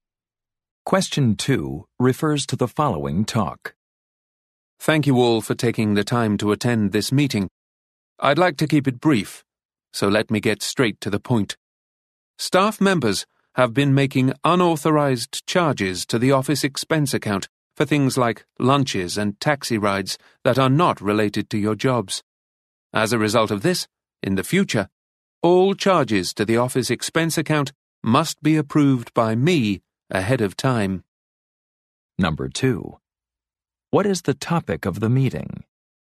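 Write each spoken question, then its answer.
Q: What is the topic of the meeting?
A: Unauthorized charges to the office expense account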